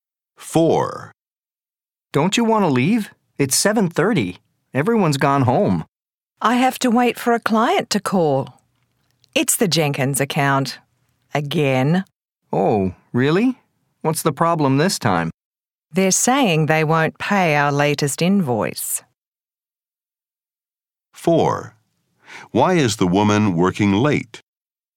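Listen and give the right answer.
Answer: She has to wait for a client to call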